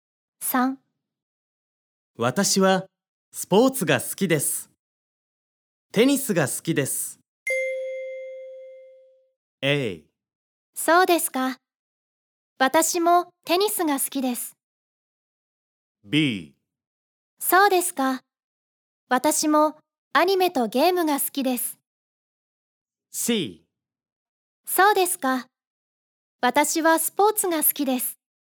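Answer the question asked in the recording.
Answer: A: そうですか。私もテニスが好きです。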